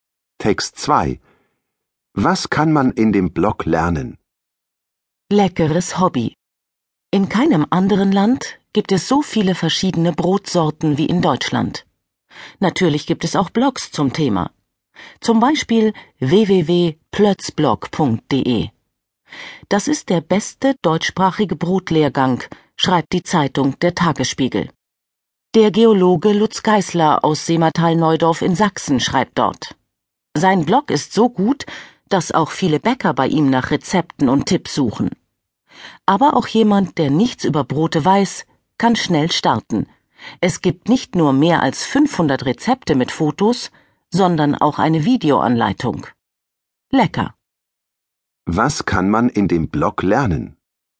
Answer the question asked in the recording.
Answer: Man lernt dort Brot backen.